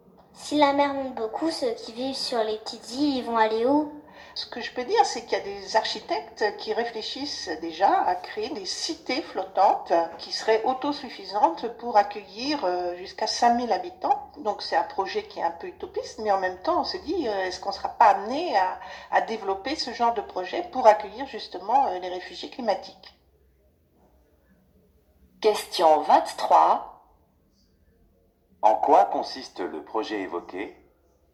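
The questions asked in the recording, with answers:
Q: En quoi consiste le projet évoqué?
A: Créer des cités flottantes autosuffisantes pour accueillir jusqu'à 5 000 habitants (réfugiés climatiques)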